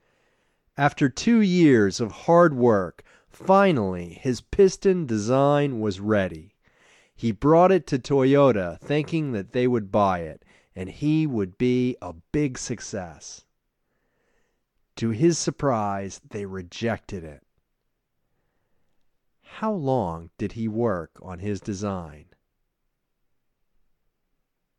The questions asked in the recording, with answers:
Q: How long did he work on his design?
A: He worked on his design for 2 years.